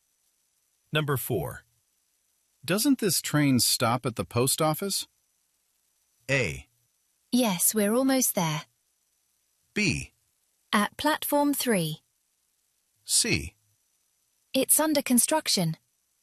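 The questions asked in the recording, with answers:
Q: Doesn't this train stop at the post office?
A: A: Yes, we're almost there.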